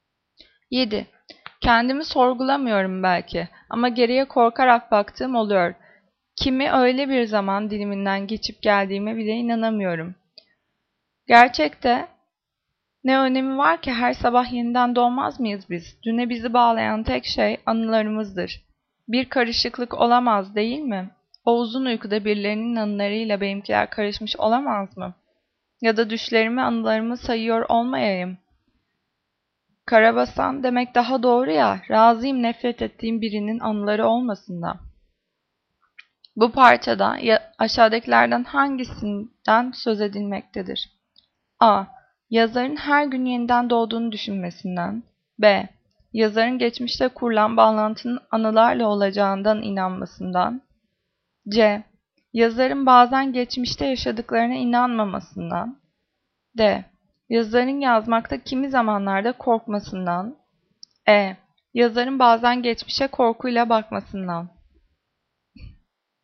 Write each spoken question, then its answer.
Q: Bu parçada aşağıdakilerden hangisinden söz edilmektedir?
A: Cevap E. Yazarın bazen geçmişe korkuyla bakmasından.